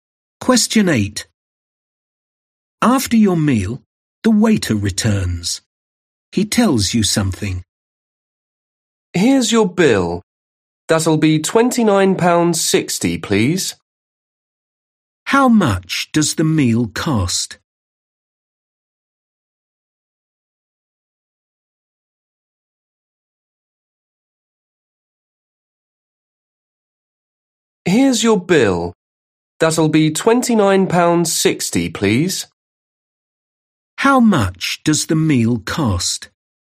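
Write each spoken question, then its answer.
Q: How much does the meal cost?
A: £29.60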